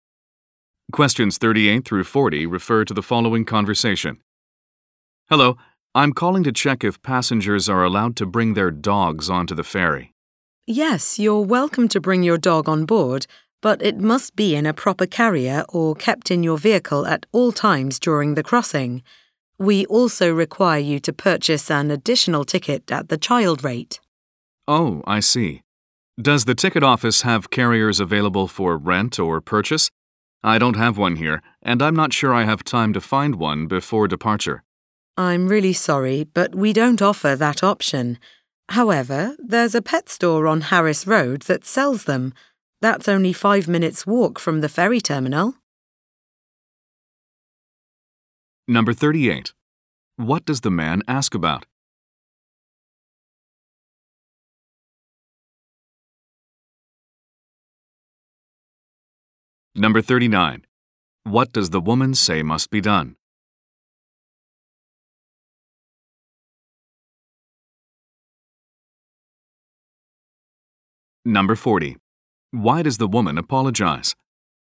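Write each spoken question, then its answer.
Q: What does the man ask about?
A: Whether dogs are allowed on the ferry

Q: What does the woman say must be done?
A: The dog must be kept in a carrier or in the vehicle

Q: Why does the woman apologize?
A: They don't offer carriers for rent or purchase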